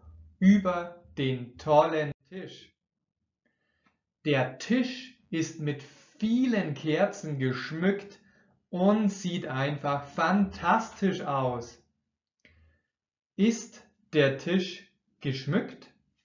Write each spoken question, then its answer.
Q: Ist der Tisch geschmückt?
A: Ja, der Tisch ist geschmückt.